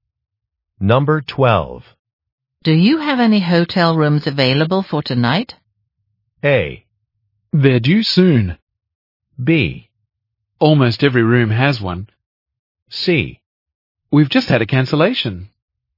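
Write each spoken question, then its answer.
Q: Do you have any hotel rooms available for tonight?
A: C: We've just had a cancellation.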